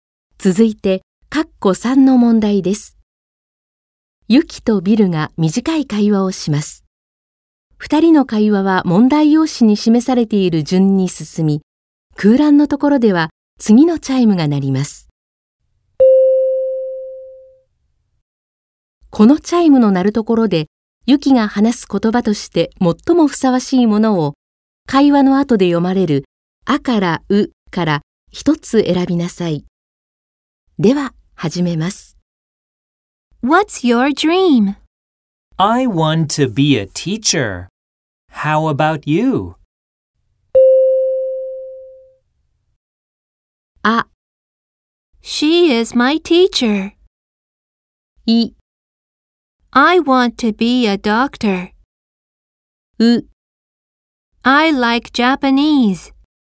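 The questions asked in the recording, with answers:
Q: What's your dream?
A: I: I want to be a doctor.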